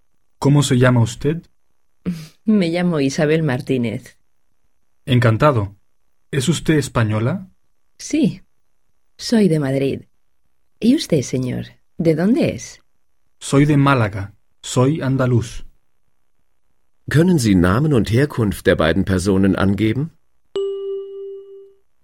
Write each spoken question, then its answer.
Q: ¿Können Sie Namen und Herkunft der beiden Personen angeben?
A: Es sind Isabel Martínez aus Madrid und Felipe Sánchez aus Málaga.